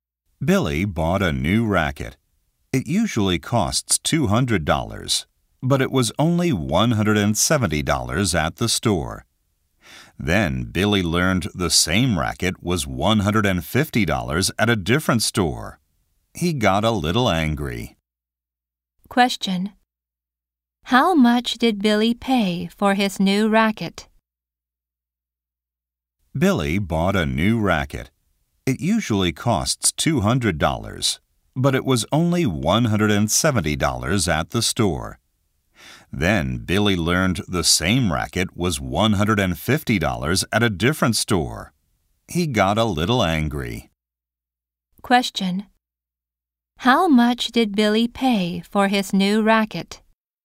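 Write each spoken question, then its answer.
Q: How much did Billy pay for his new racket?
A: $170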